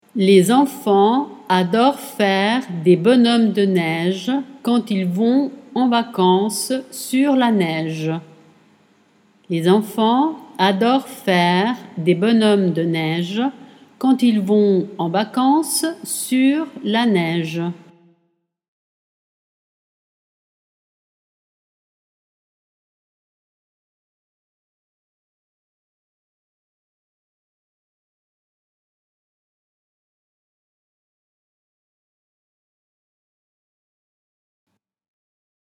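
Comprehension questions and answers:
Les quand ils .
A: enfants adorent faire des bonhommes de neige / vont en vacances sur la neige

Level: Dettato di francese A2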